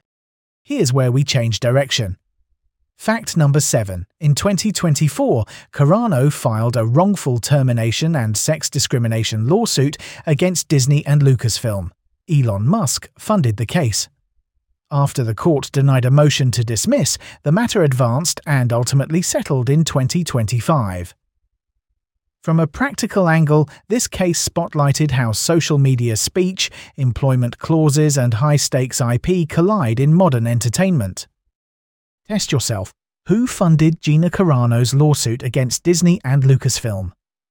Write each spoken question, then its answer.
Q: Who funded Gina Carano's lawsuit against Disney and Lucasfilm?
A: Elon Musk.